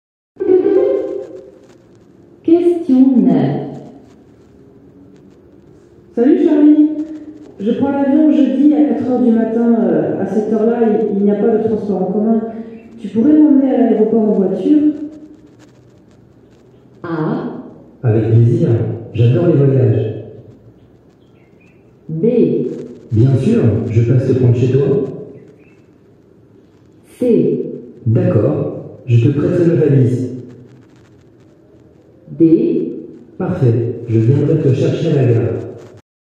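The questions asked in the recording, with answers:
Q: Tu pourrais m'emmener à l'aéroport en voiture?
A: B: Bien sûr. Je passe te prendre chez toi.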